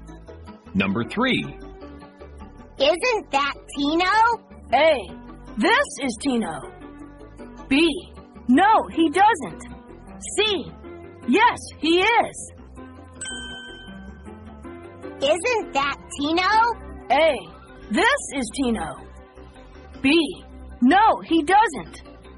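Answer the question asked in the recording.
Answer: C: Yes, he is.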